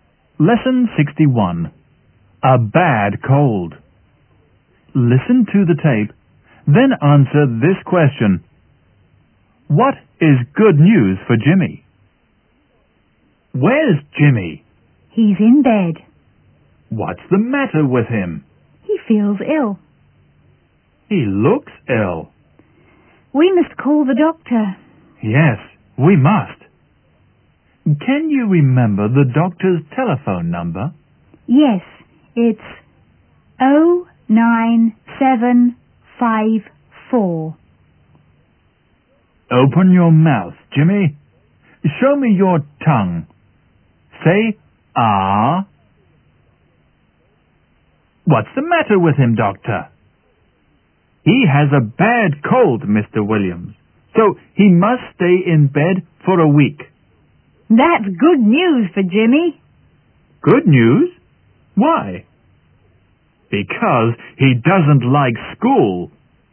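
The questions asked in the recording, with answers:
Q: What is good news for Jimmy?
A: He must stay in bed for a week, so he can't go to school (he doesn't like school).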